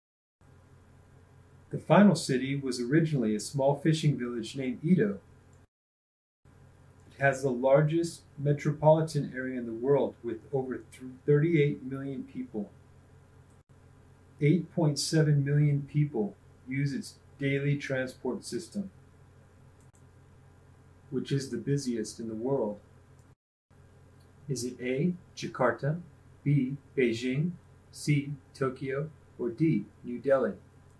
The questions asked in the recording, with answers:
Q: Is it A, Jakarta, B, Beijing, C, Tokyo, or D, New Delhi?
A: If you answered Tokyo, you're correct.